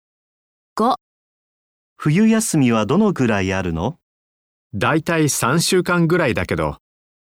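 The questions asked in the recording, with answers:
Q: 冬休みはどのくらいあるの?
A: 3週間ぐらい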